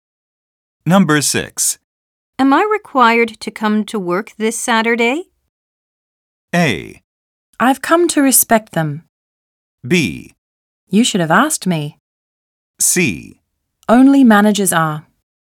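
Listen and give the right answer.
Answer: C: Only managers are.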